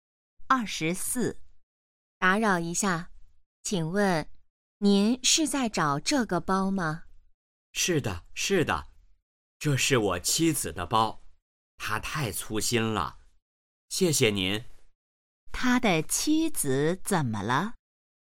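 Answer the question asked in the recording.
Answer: 把包丢了,很粗心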